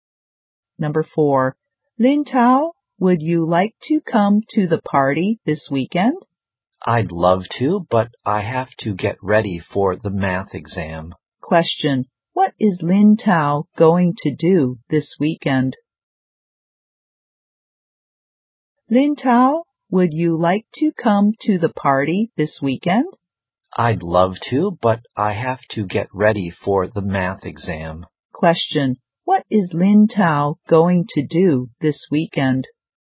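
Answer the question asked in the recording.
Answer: Get ready for the math exam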